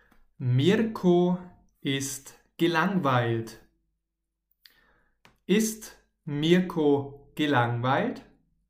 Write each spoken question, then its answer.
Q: Ist Mirko gelangweilt?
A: Ja, genau. Mirko ist gelangweilt.